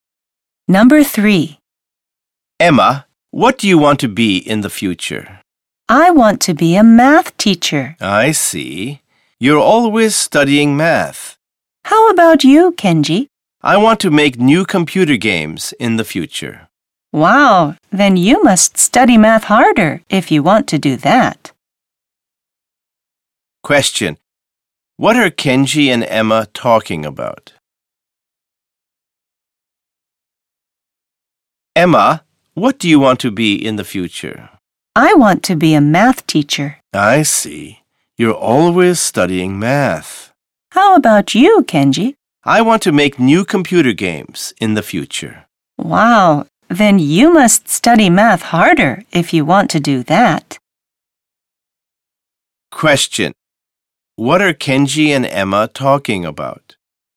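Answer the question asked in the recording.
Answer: What they want to be in the future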